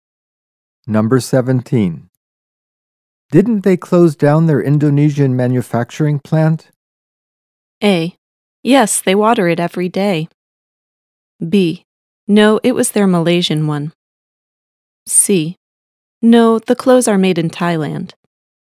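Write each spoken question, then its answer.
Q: Didn't they close down their Indonesian manufacturing plant?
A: B: No, it was their Malaysian one.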